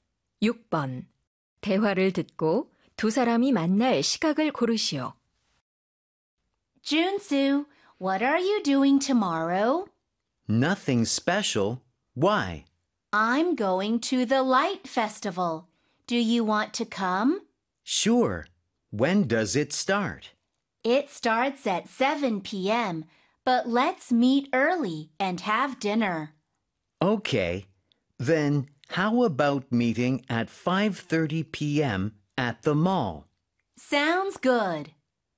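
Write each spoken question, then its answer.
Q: 대화를 듣고 두 사람이 만날 시각을 고르시오.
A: 오후 5시 30분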